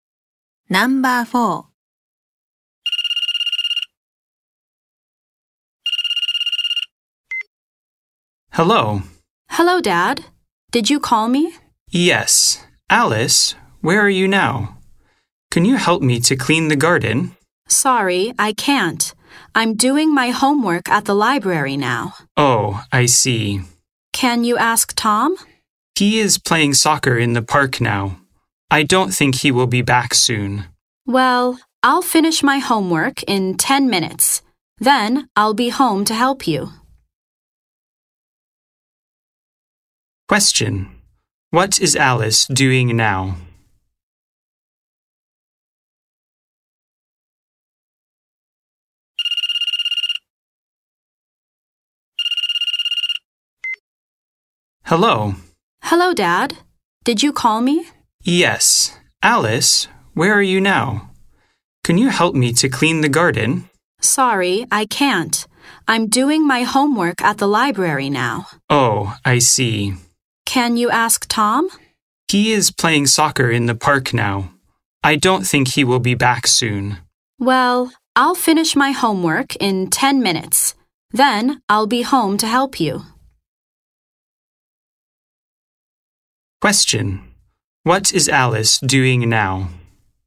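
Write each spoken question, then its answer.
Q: What is Alice doing now?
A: She is doing her homework at the library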